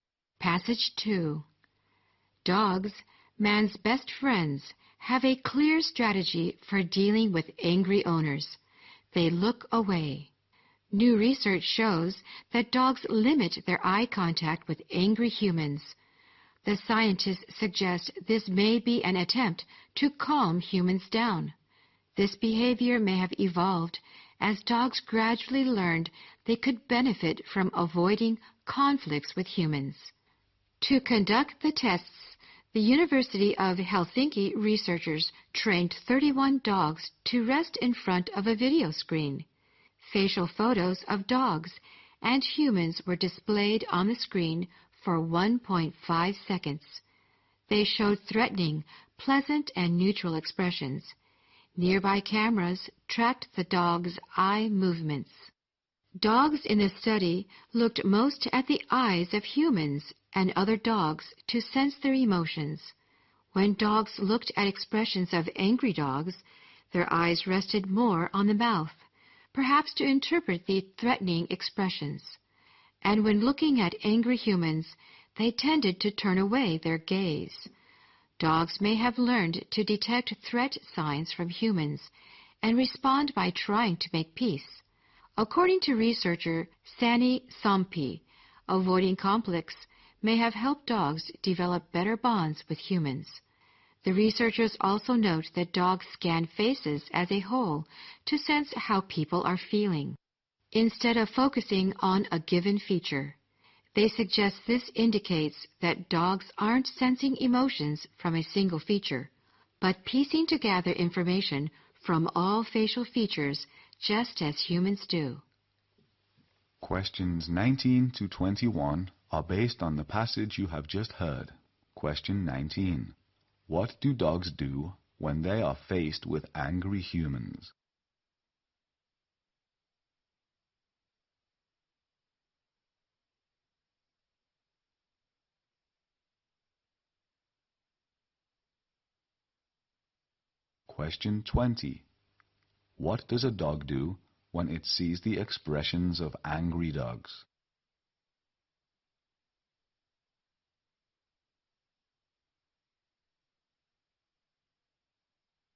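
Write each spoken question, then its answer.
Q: What do dogs do when they are faced with angry humans?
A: They look away and avoid eye contact

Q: What does a dog do when it sees the expressions of angry dogs?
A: Its eyes rest more on the mouth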